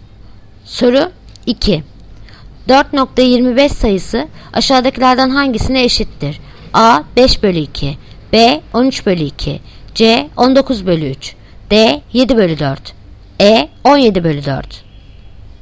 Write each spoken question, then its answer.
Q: 4.25 sayısı aşağıdakilerden hangisine eşittir?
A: Yanıt Edirne 17/4.